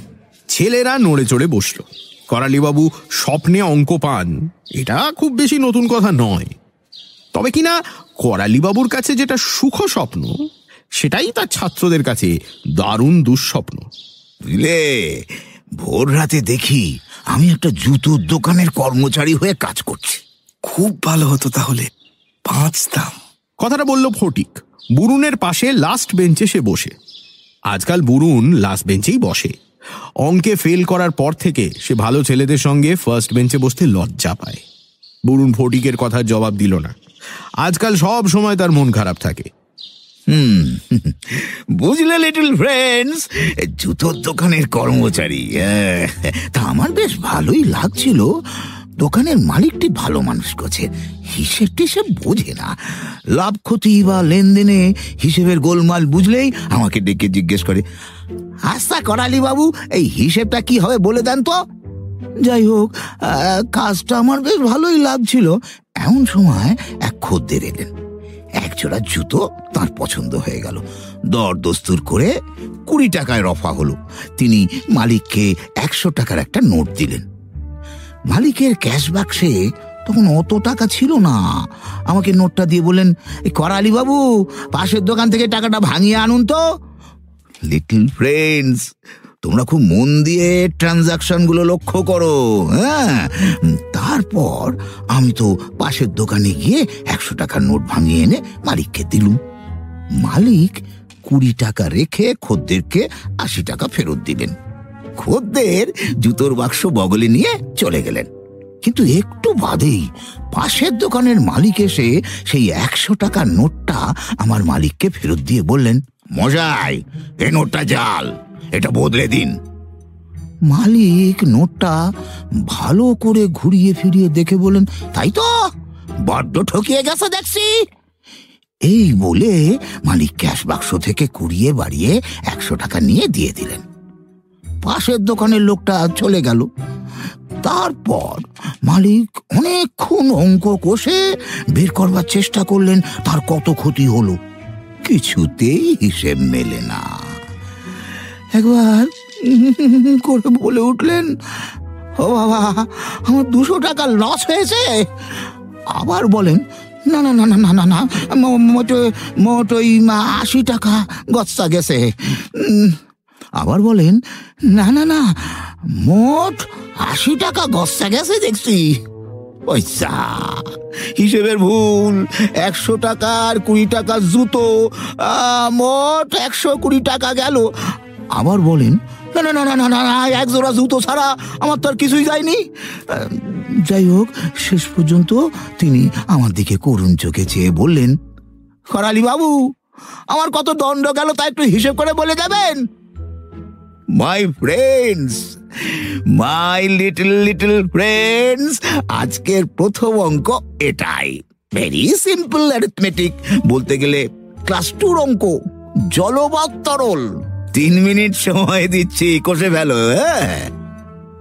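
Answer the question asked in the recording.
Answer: 100 টাকা (খদ্দেরকে ফেরত দেওয়া 80 টাকা আর 20 টাকার জুতো)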